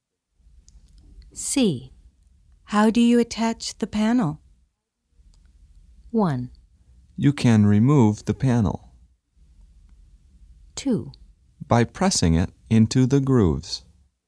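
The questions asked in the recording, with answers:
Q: How do you attach the panel?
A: 2: By pressing it into the grooves.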